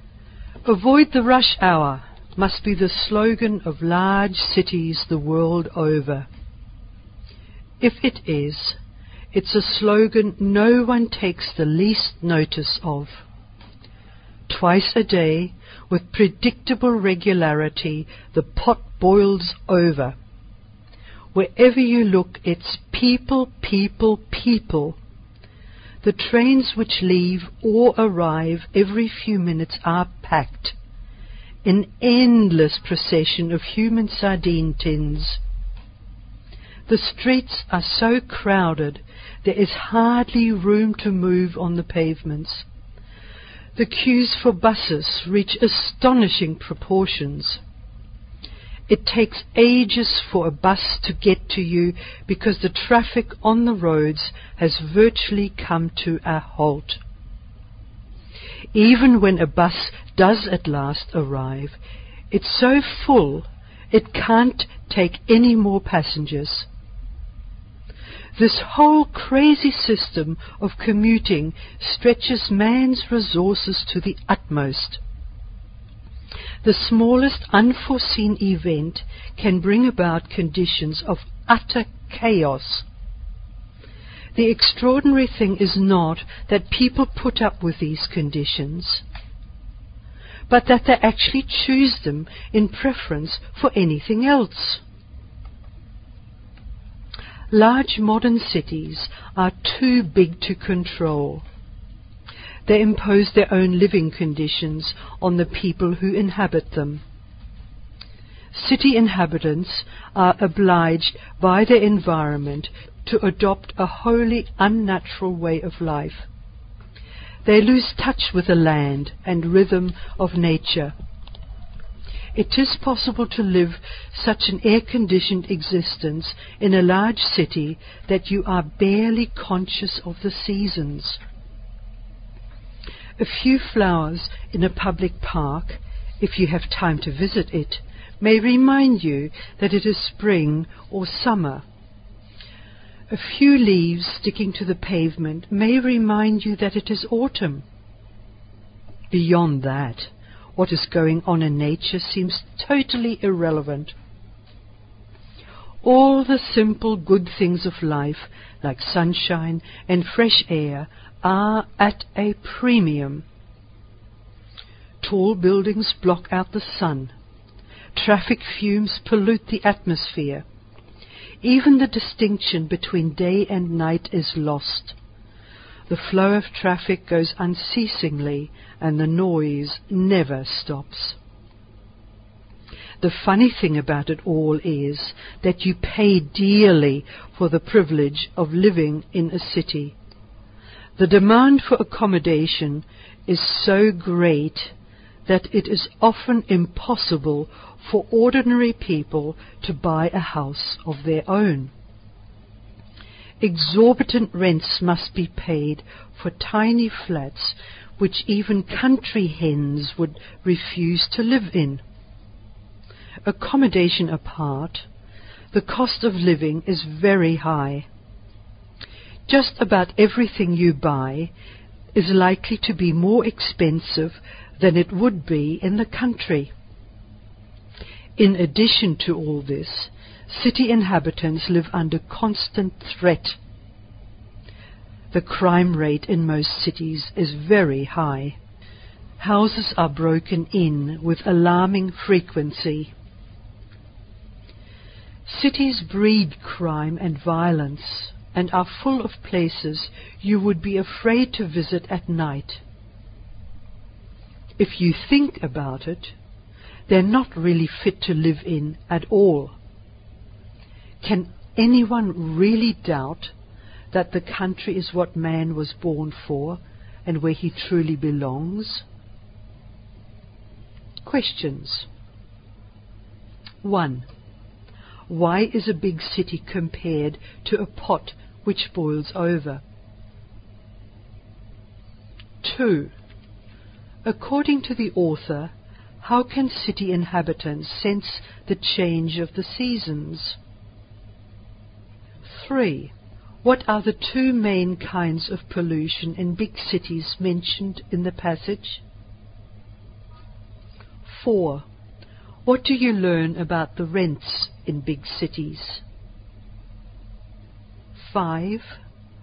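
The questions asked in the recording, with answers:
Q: Why is a big city compared to a pot which boils over?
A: Because twice a day in the rush hour it overflows with crowds of people

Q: According to the author, how can city inhabitants sense the change of the seasons?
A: From a few flowers in a public park or a few leaves sticking to the pavement

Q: What are the two main kinds of pollution in big cities mentioned in the passage?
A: Traffic fumes (air pollution) and noise

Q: What do you learn about the rents in big cities?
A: They are exorbitant, even for tiny flats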